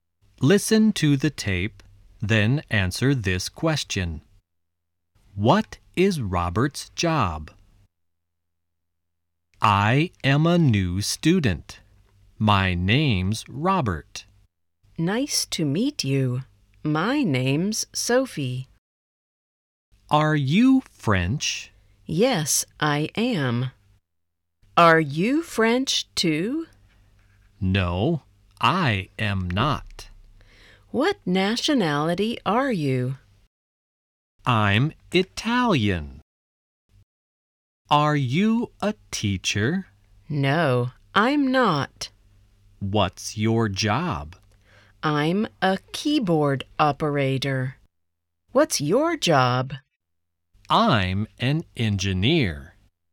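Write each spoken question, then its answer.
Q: What is Robert's job?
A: He's an engineer.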